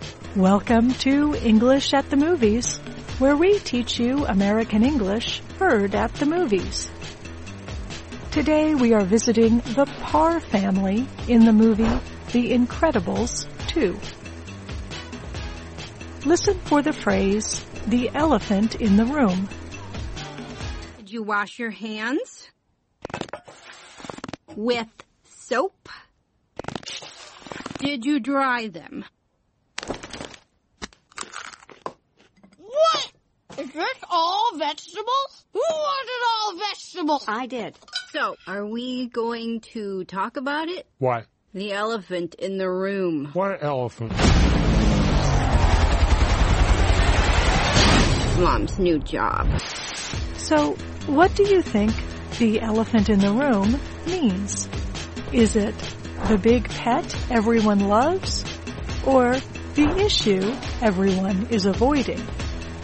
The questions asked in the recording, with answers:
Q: So, what do you think the elephant in the room means?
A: The elephant in the room means the issue everyone is avoiding.